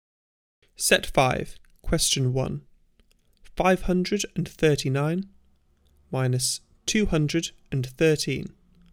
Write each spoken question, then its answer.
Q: 539 minus 213.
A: Answer 326.